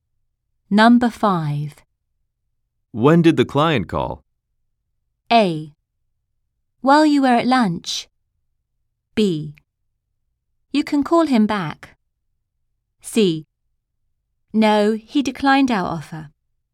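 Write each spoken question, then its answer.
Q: When did the client call?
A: A: While you were at lunch.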